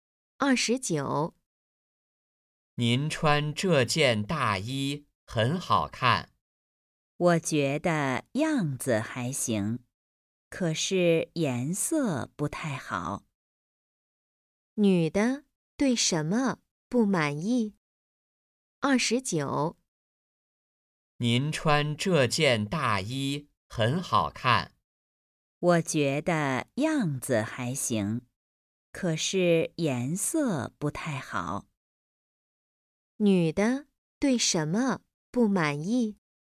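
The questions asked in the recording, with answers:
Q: 女的对什么不满意?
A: (大衣的)颜色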